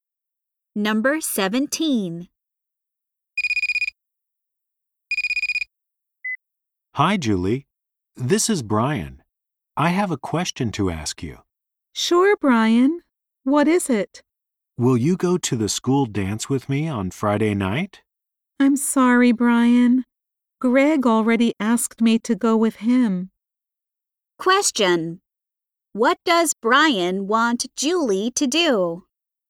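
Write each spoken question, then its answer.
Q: What does Brian want Julie to do?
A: Go to the school dance with him.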